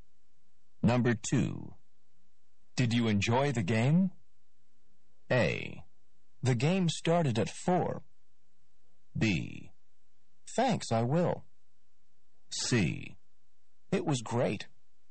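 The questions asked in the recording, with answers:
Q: Did you enjoy the game?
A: C: It was great.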